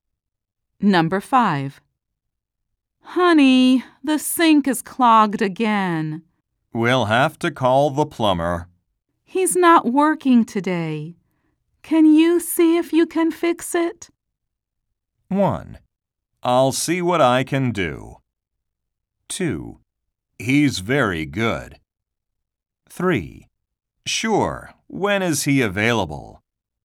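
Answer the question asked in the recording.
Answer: 1: I'll see what I can do.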